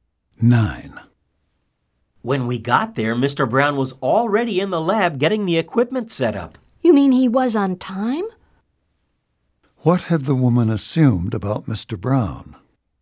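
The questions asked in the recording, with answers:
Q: What had the woman assumed about Mr. Brown?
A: That he would be late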